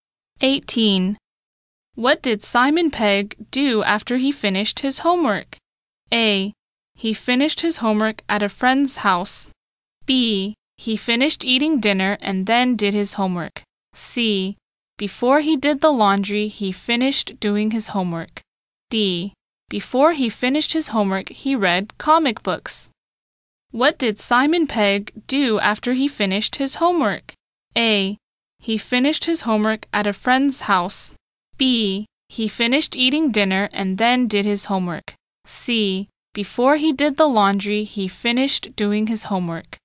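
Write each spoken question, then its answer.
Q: What did Simon Pegg do after he finished his homework?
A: C: Before he did the laundry, he finished doing his homework.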